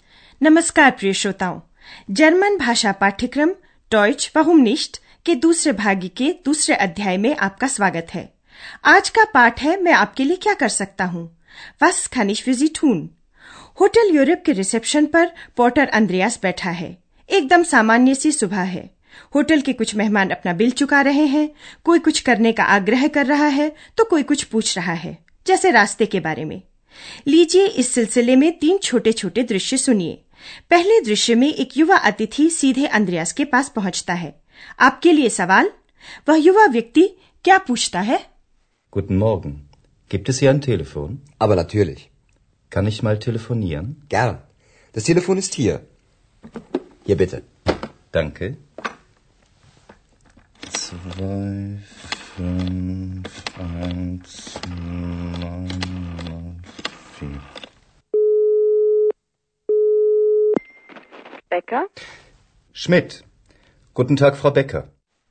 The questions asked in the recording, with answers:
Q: वह युवा व्यक्ति क्या पूछता है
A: क्या आप समझ गए कि वह युवा व्यक्ति telephone के बारे में पूछ रहा था